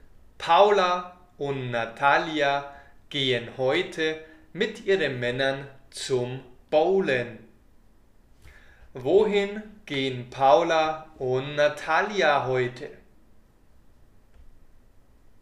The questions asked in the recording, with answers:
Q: Wohin gehen Paula und Natalia heute?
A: zum Bowlen. Paula und Natalia gehen heute zum Bowlen.